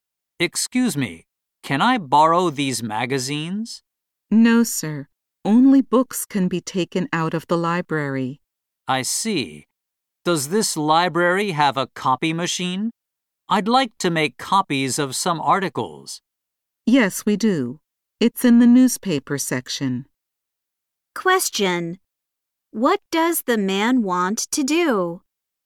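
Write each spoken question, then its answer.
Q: What does the man want to do?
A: Make copies of some articles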